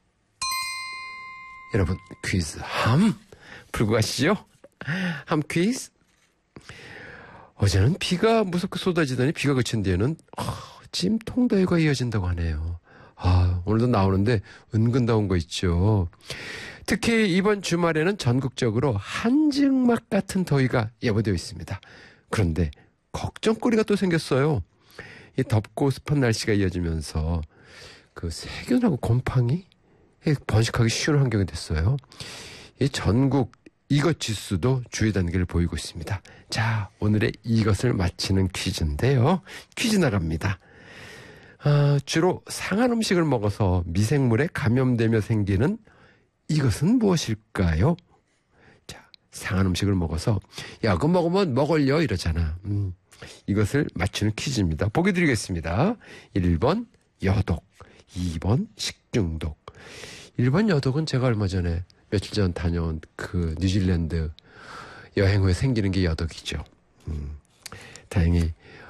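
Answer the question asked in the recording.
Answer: 2: 식중독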